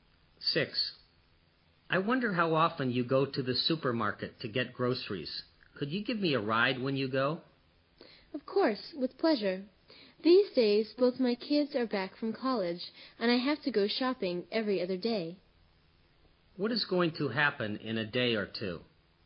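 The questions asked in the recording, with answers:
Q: What is going to happen in a day or two?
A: The woman will go shopping and give the man a ride to the supermarket.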